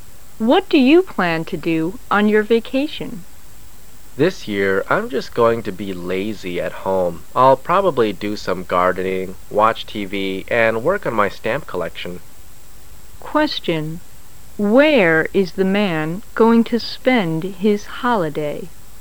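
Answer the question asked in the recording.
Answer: At home

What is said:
[解析] W: What do you plan to do on your vacation? M: This year I'm just going to be lazy at home. I'll probably do some gardening, watch TV and work on my stamp collection. Q: Where is the man going to spend his holiday?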